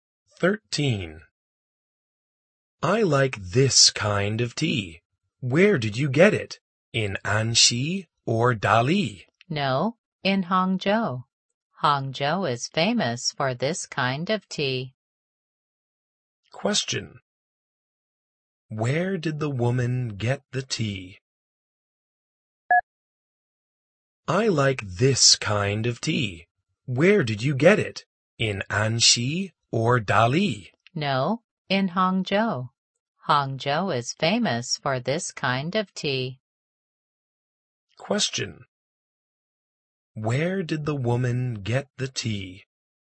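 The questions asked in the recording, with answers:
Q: Where did the woman get the tea?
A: In Hangzhou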